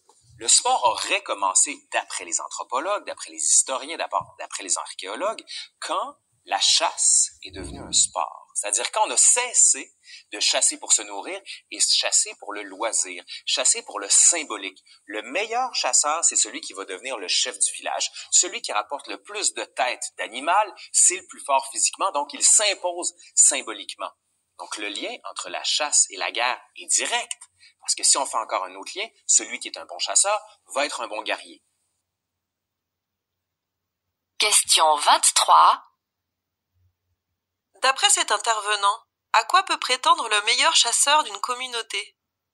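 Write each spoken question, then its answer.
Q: D'après cet intervenant, à quoi peut prétendre le meilleur chasseur d'une communauté?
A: Devenir le chef du village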